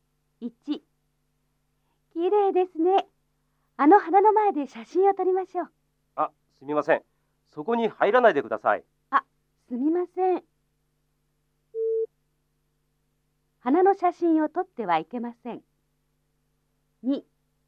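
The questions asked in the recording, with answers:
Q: 花の写真を撮ってはいけません。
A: ×(間違い)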